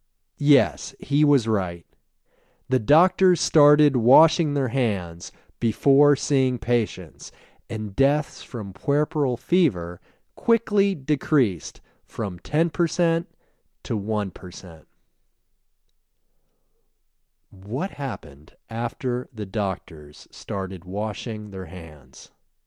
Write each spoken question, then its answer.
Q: What happened after the doctors started washing their hands?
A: After the doctors started washing their hands, deaths from puerperal fever quickly decreased from 10% to 1%.